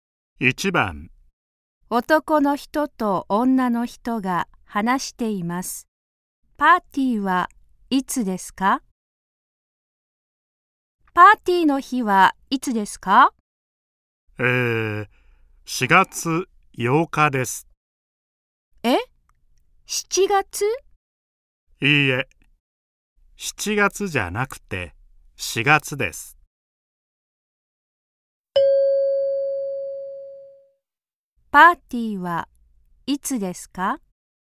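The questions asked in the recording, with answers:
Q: パーティーはいつですか?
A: 4月8日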